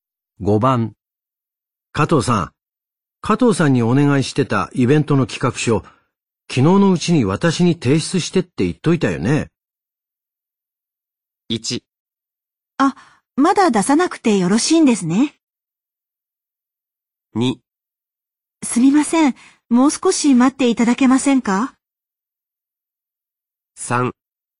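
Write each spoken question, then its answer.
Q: 加藤さん。加藤さんにお願いしてたイベントの企画書、昨日のうちに私に提出してって言っといたよね。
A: 2: すみません。もう少し待っていただけませんか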